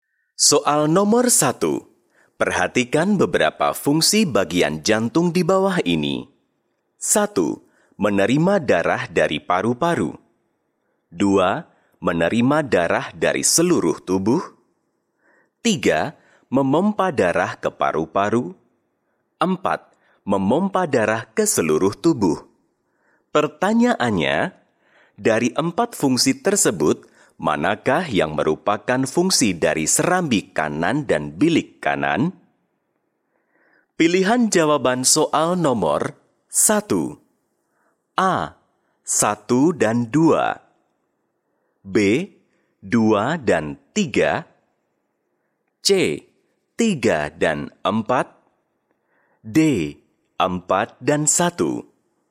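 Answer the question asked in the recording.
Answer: B: 2 dan 3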